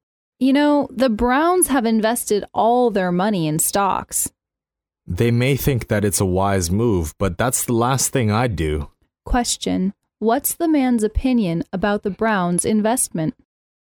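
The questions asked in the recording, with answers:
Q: what's the man's opinion about the Browns' investment?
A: It is unwise; he would never do it.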